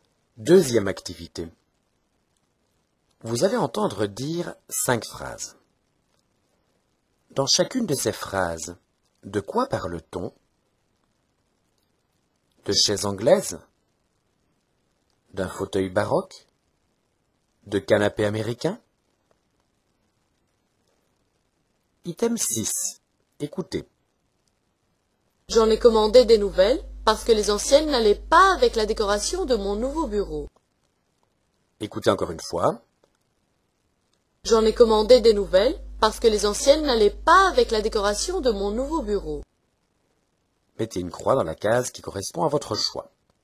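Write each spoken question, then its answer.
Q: Dans chacune de ces phrases, de quoi parle-t-on?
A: De chaises anglaises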